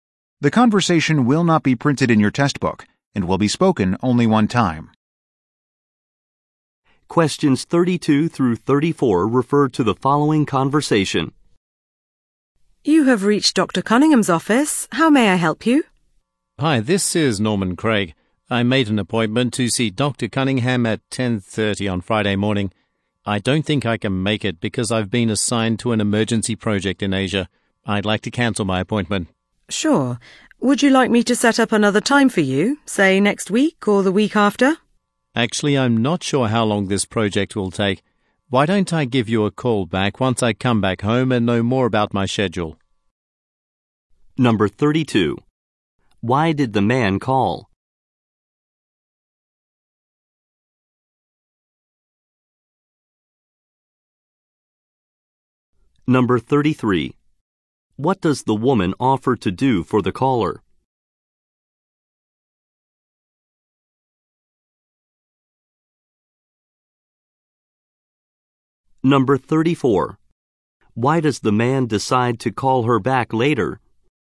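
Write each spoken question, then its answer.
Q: Why did the man call?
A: To cancel his appointment

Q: What does the woman offer to do for the caller?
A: Set up another appointment time

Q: Why does the man decide to call her back later?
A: He is unsure how long his project will take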